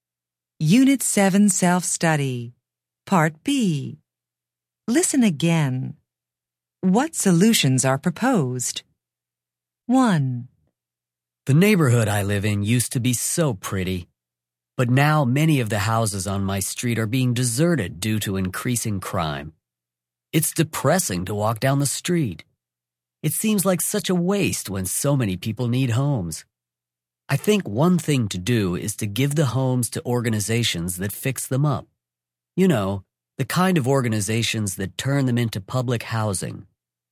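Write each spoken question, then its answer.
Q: What solutions are proposed?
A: Give the homes to organizations that fix them up as public housing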